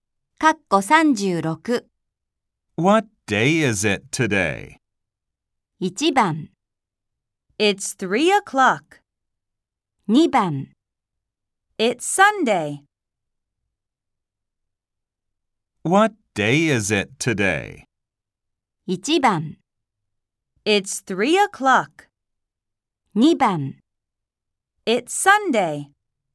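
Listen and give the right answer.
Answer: 2: It's Sunday.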